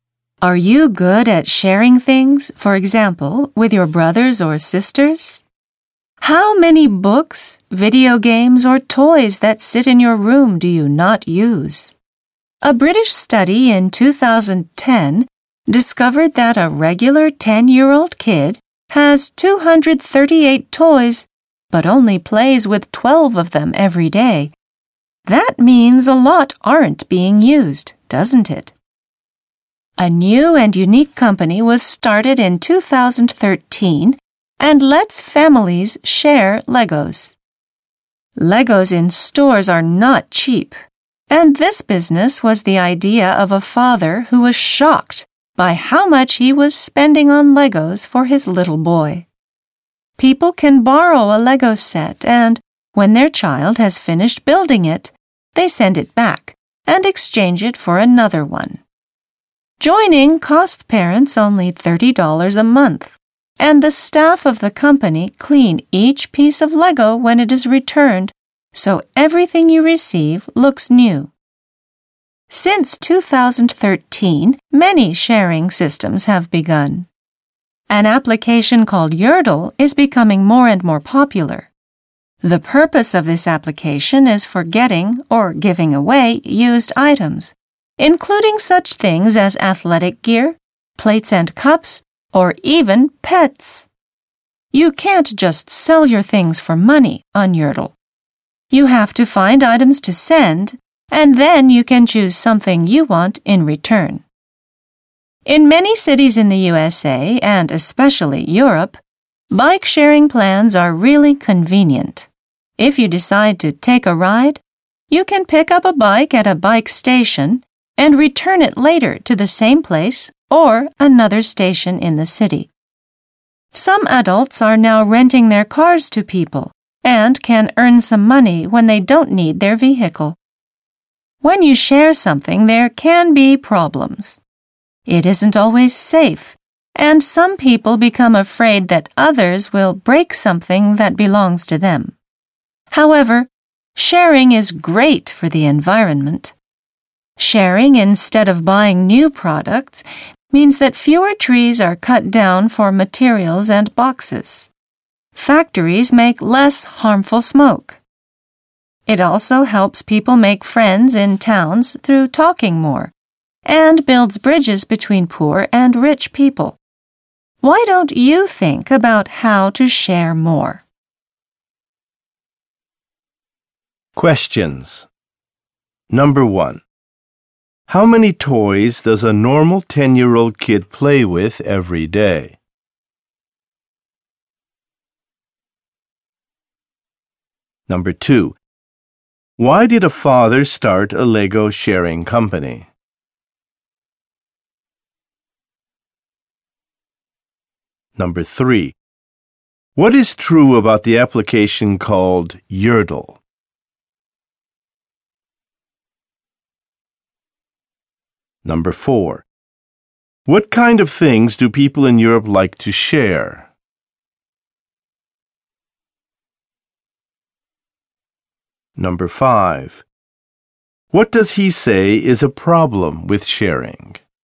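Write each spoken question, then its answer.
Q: How many toys does a normal 10-year-old kid play with every day?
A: 12

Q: Why did a father start a Lego sharing company?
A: He was shocked by how much he was spending on Legos for his son

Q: what is true about the application called Yertle?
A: It is for getting or giving away used items; you can't just sell things for money, you exchange them

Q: what kind of things do people in Europe like to share?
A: Bikes

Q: what does he say is a problem with sharing?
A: It isn't always safe; people fear others will break their things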